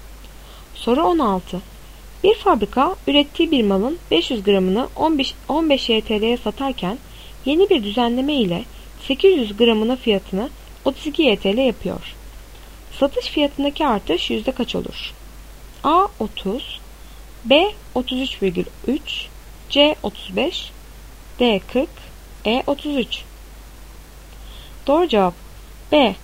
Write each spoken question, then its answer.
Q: Satış fiyatındaki artış yüzde kaç olur?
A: Doğru cevap B. 33,3.